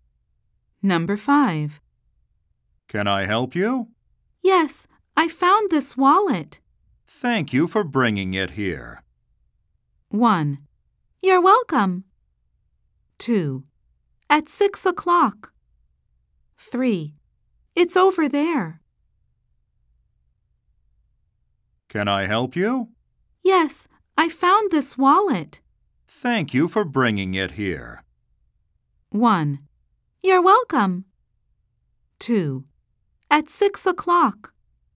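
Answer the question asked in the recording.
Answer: 1: You're welcome.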